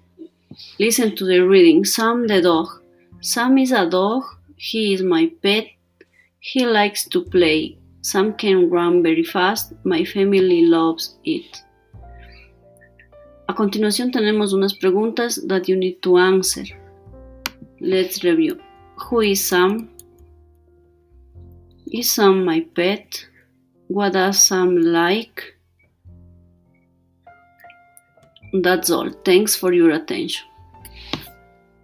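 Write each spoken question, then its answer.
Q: Who is Sam?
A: Sam is a dog.

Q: Is Sam my pet?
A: Yes, he is.

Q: What does Sam like?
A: He likes to play.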